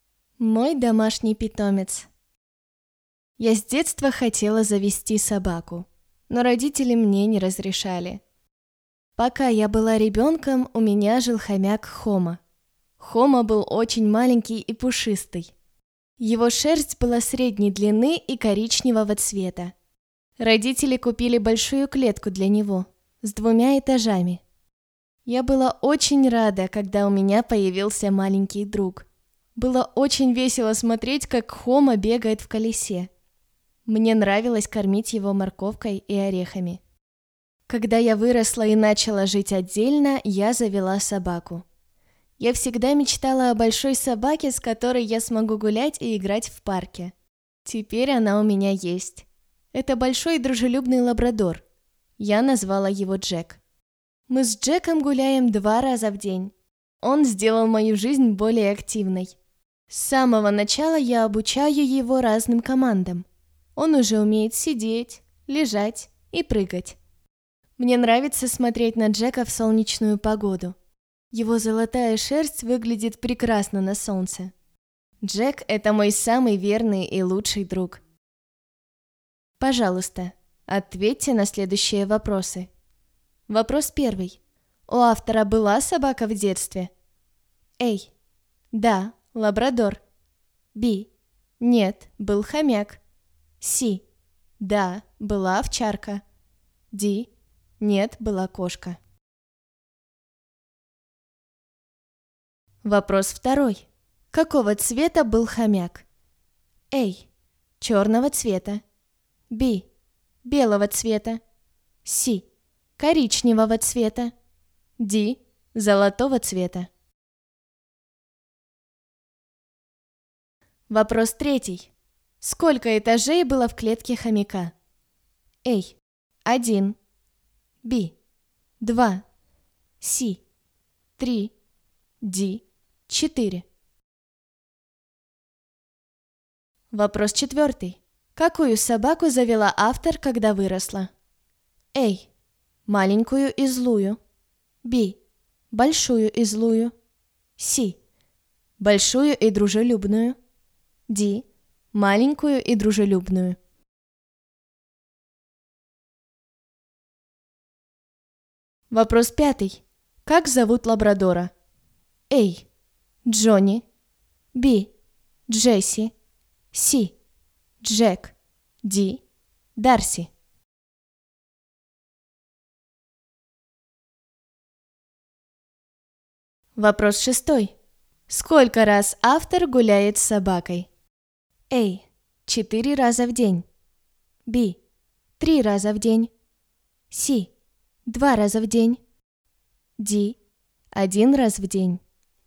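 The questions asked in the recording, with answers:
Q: У автора была собака в детстве?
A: B: Нет, был хомяк.

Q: Какого цвета был хомяк?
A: C: Коричневого цвета.

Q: Сколько этажей было в клетке хомяка?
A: B: Два.

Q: Какую собаку завела автор, когда выросла?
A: C: Большую и дружелюбную.

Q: Как зовут лабрадора?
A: C: Джек.

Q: Сколько раз автор гуляет с собакой?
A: C: 2 раза в день.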